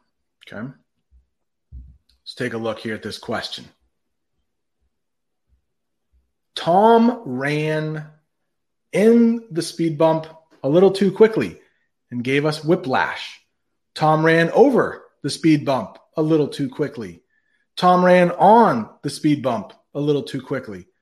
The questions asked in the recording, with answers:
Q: Tom ran in the speed bump a little too quickly and gave us whiplash.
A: Over. Over. He ran over the speed bump.